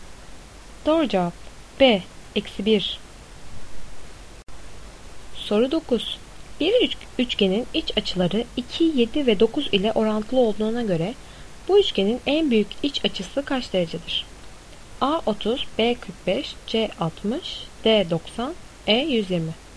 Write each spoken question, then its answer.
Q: Bir üçgenin iç açıları 2, 7 ve 9 ile orantılı olduğuna göre bu üçgenin en büyük iç açısı kaç derecedir?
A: Doğru cevap D 90.